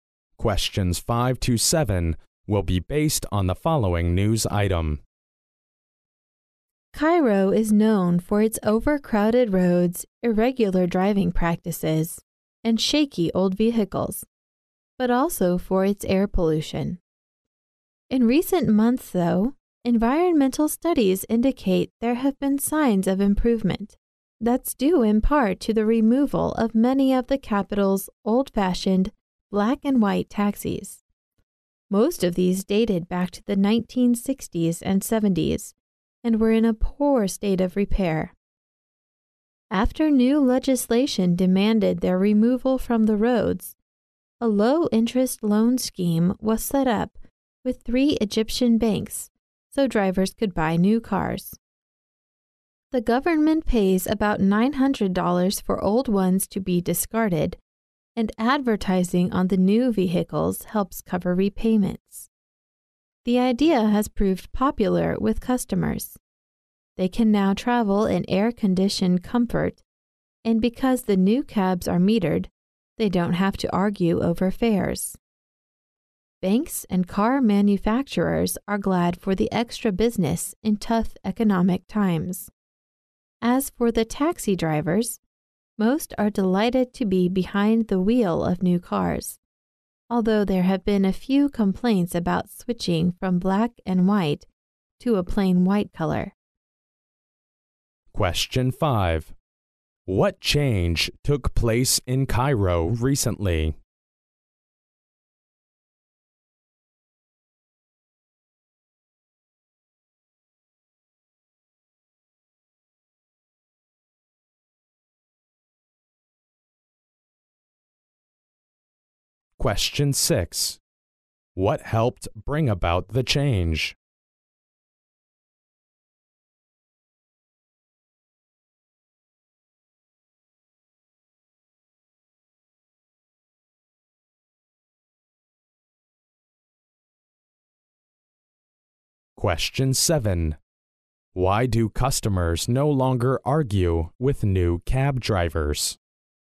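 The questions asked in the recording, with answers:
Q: What change took place in Cairo recently?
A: Its air pollution has improved (fewer signs of pollution).

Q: What helped bring about the change?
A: The removal of many old black and white taxis.

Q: Why do customers no longer argue with new cab drivers?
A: Because the new cabs are metered.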